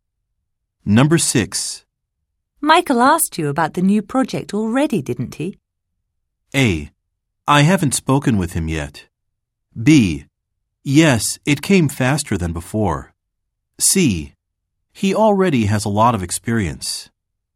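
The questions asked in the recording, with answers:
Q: Michael asked you about the new project already, didn't he?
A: A: I haven't spoken with him yet.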